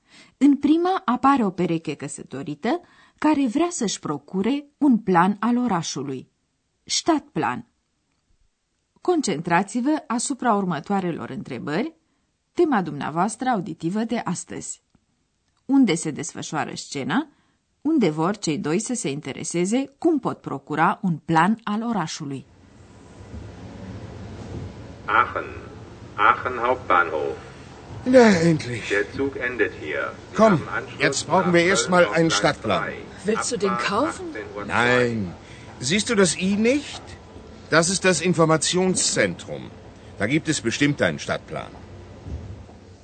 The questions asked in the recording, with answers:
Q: Unde se desfășoară scena unde vor cei doi să se intereseze cum pot procura un plan al orașului.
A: Scena are loc în gara centrală din Aachen.